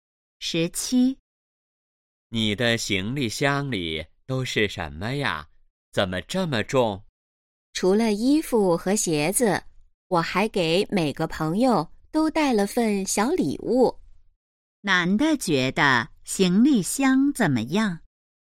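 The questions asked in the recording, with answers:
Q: 男的觉得行李箱怎么样?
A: 很重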